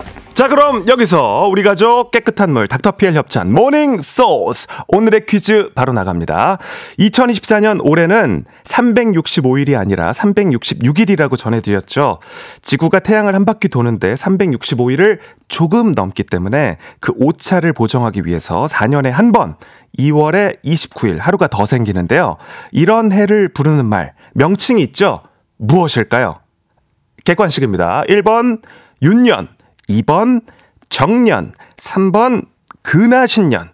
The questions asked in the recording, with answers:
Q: 이런 해를 부르는 말 명칭이 있죠. 무엇일까요?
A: 네, 정답 1번 윤년입니다.